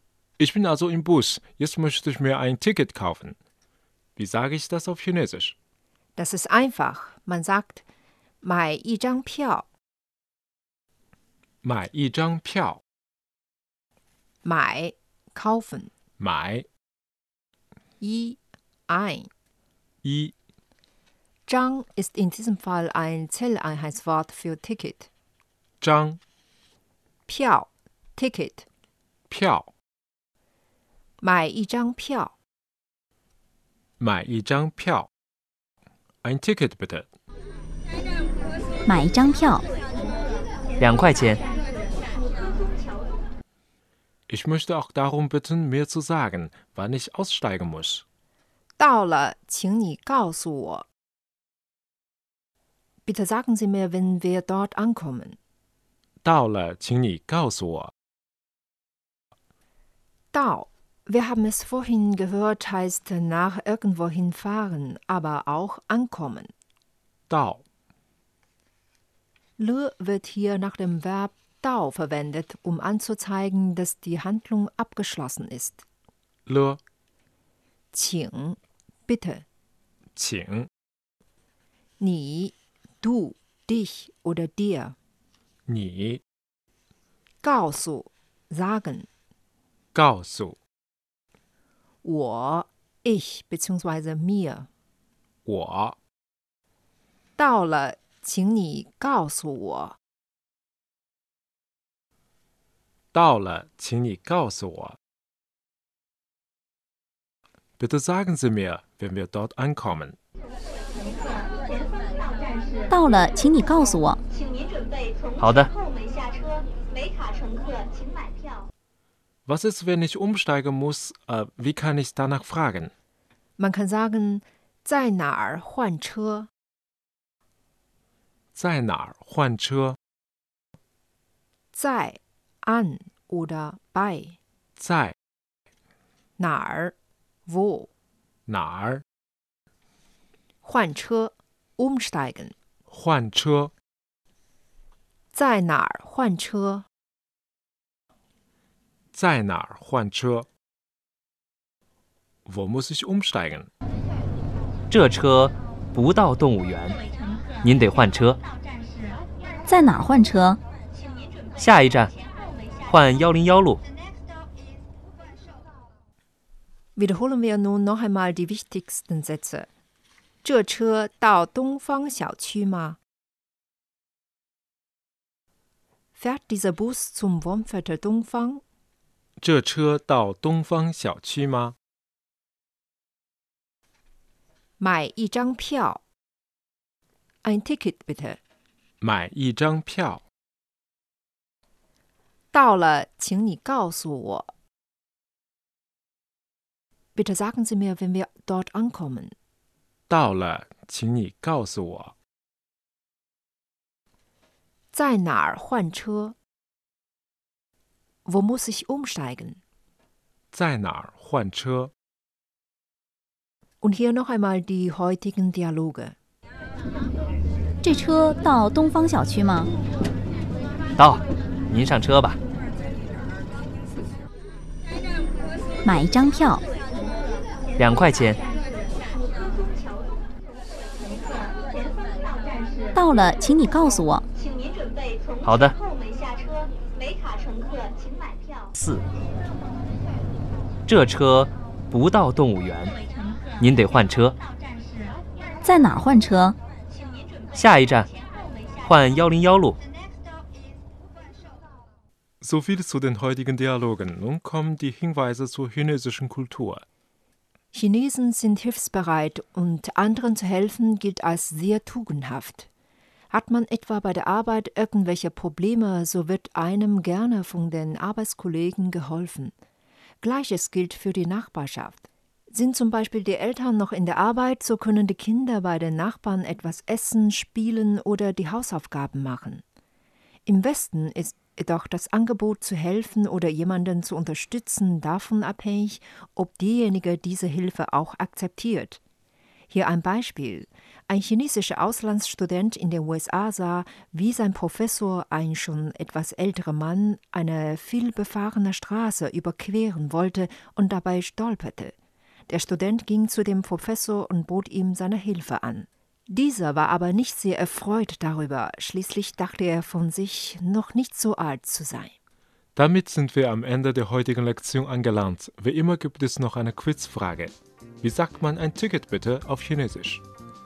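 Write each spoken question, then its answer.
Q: Wie sagt man ein Ticket bitte auf Chinesisch?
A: 买一张票 (Mai yi zhang piao)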